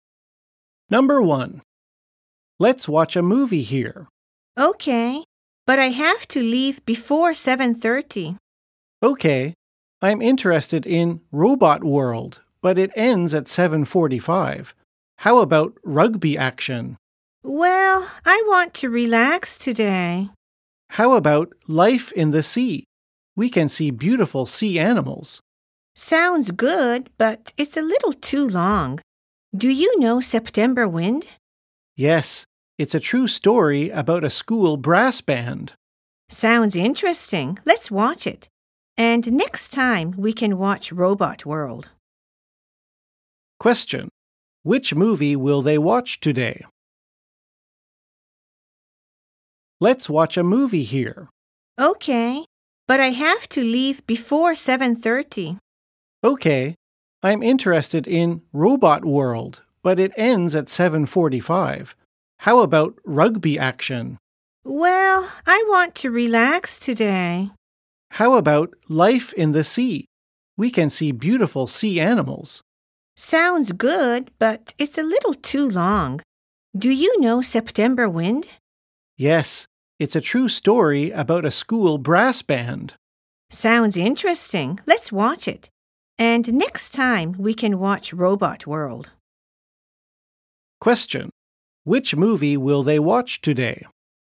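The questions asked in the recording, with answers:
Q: Which movie will they watch today?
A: September Wind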